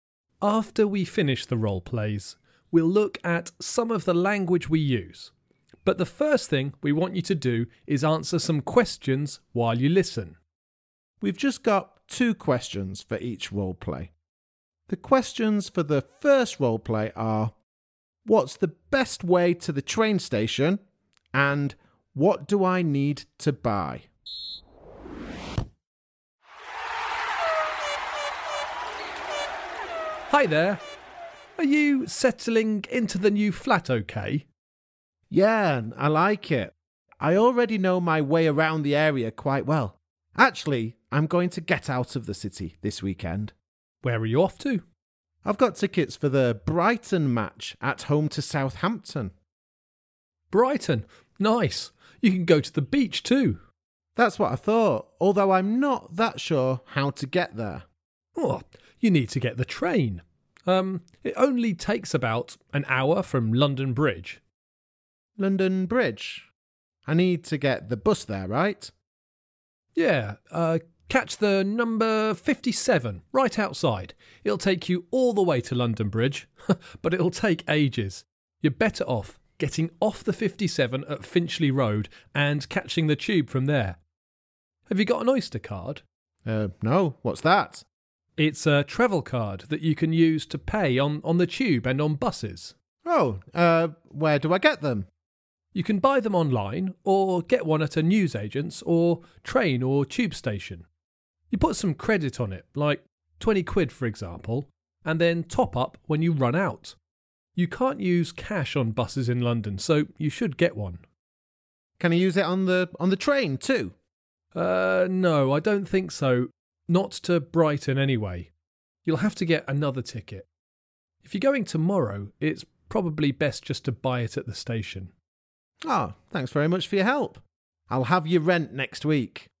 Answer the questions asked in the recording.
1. Well, the best way to the station was catching the bus and then taking the underground.
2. And the thing I needed to buy was an Oyster card, because you can't use cash on buses in London.